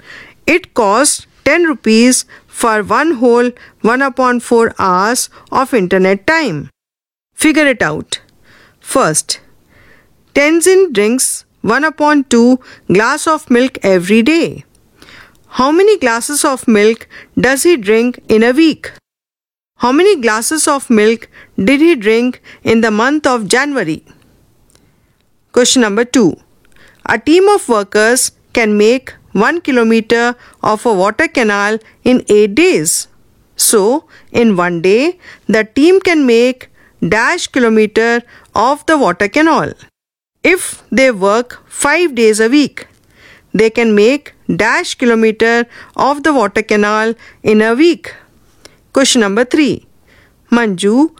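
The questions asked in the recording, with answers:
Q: How many glasses of milk does he drink in a week?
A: 7/2 glasses (3 1/2)

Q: How many glasses of milk did he drink in the month of January?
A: 31/2 glasses (15 1/2)

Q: So, in 1 day, the team can make dash kilometer of the water canal.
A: 1/8 kilometer

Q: If they work 5 days a week, they can make dash kilometer of the water canal in a week.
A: 5/8 kilometer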